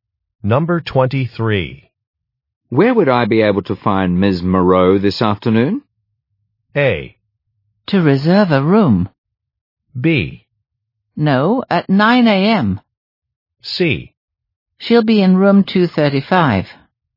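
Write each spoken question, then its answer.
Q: Where would I be able to find Ms. Moreau this afternoon?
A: C: She'll be in room 235.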